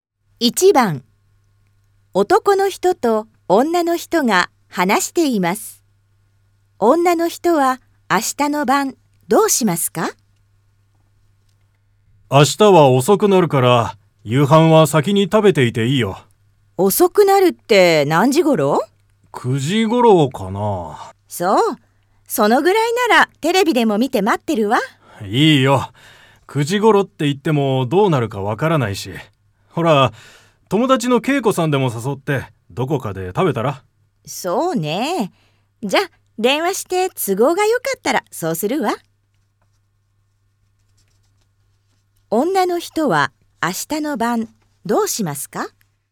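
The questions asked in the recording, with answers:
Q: 女の人は明日の晩どうしますか?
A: 友達の恵子さんに電話して、都合がよければ一緒にどこかで夕飯を食べる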